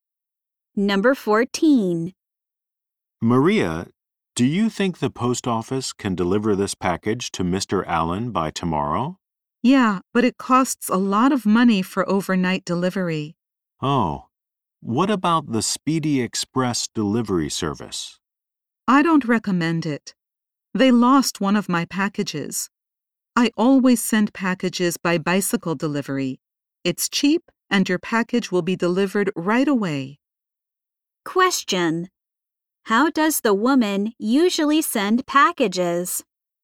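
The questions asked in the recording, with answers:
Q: how does the woman usually send packages?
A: By bicycle delivery.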